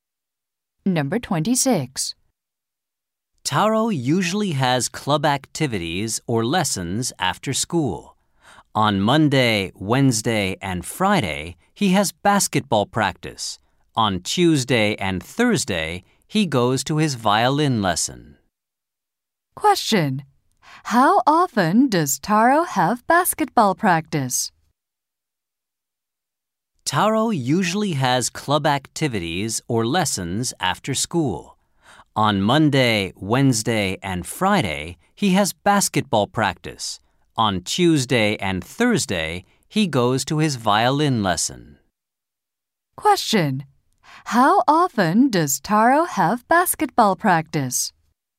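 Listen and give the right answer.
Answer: Three times a week.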